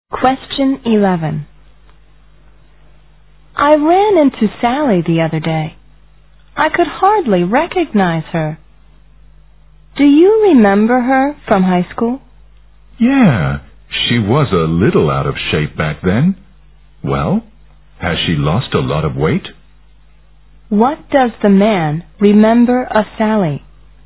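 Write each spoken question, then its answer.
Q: What does the man remember of Sally?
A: She was a little out of shape (overweight) in high school.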